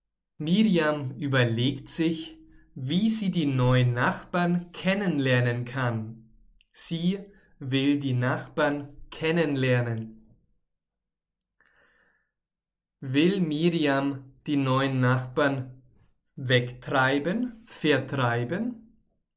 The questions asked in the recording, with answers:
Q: Will Miriam die neuen Nachbarn wegtreiben, vertreiben?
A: Nein, das will sie nicht tun.